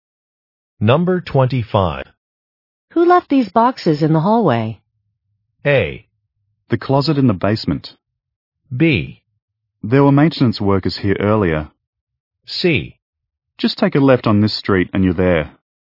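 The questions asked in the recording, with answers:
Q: Who left these boxes in the hallway?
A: B: There were maintenance workers here earlier.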